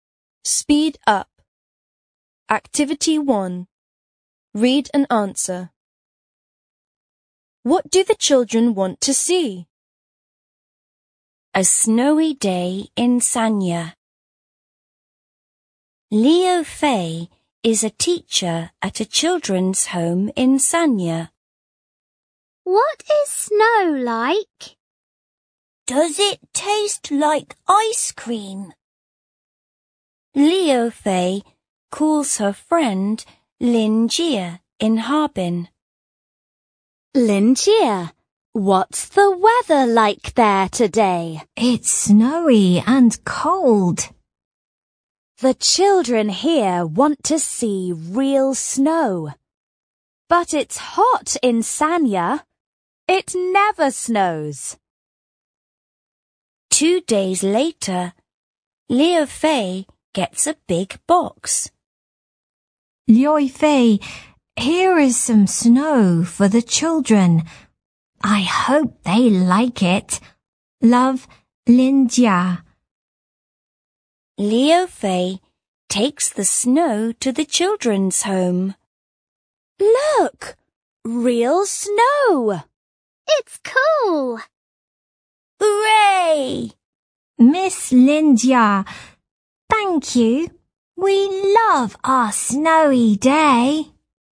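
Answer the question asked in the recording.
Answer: Real snow.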